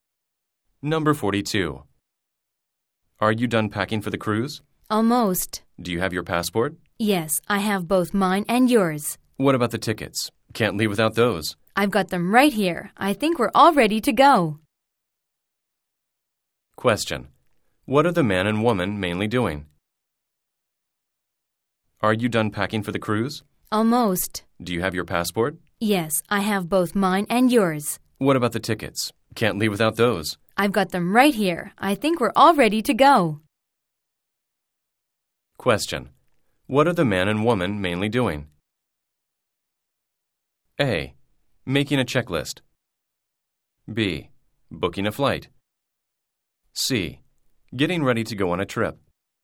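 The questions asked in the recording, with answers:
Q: What are the man and woman mainly doing?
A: C: Getting ready to go on a trip.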